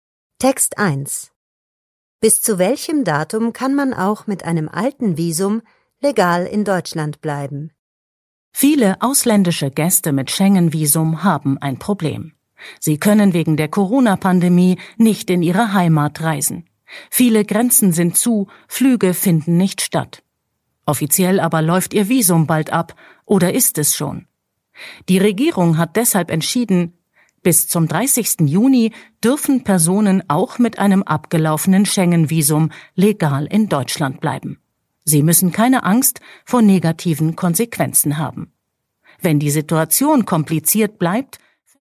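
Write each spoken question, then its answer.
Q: Bis zu welchem Datum kann man auch mit einem alten Visum legal in Deutschland bleiben?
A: Bis zum 30. Juni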